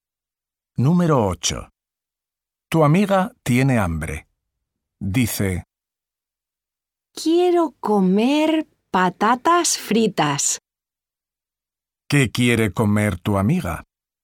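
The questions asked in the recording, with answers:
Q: ¿Qué quiere comer tu amiga?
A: patatas fritas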